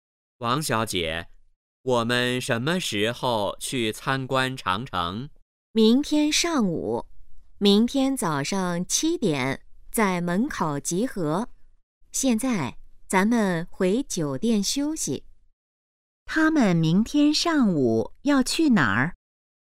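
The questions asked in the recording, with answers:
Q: 他们明天上午要去哪儿?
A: 长城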